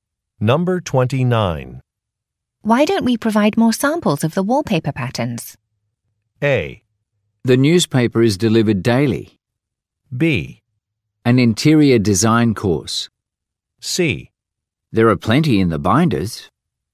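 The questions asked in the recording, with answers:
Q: Why don't we provide more samples of the wallpaper patterns?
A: C: There are plenty in the binders.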